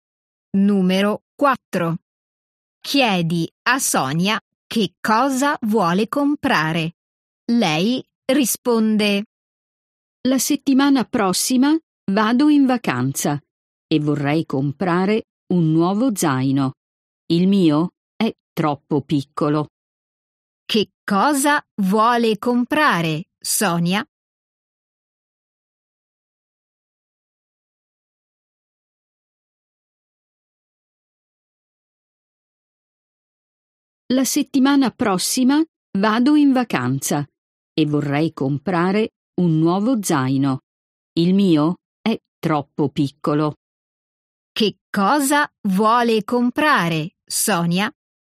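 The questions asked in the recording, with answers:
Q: Che cosa vuole comprare, Sonia?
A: un nuovo zaino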